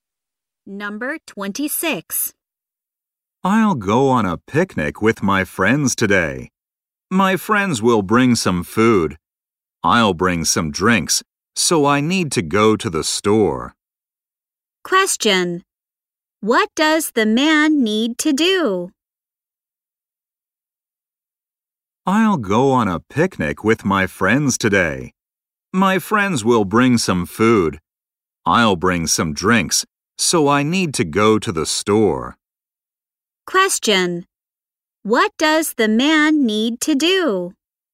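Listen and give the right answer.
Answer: Go to the store to buy drinks.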